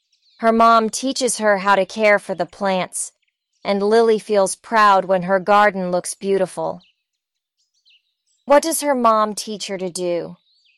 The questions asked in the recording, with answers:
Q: What does her mom teach her to do?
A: To care for the plants. Her mom teaches her to care for the plants.